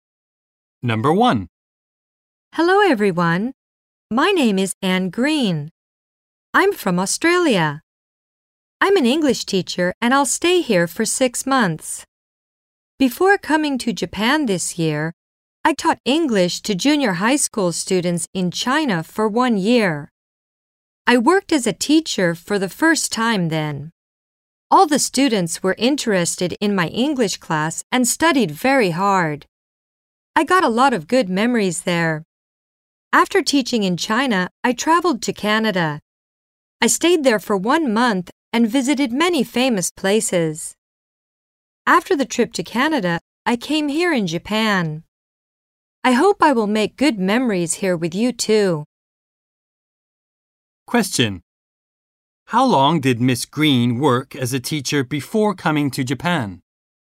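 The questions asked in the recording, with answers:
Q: How long did Miss Green work as a teacher before coming to Japan?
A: For one year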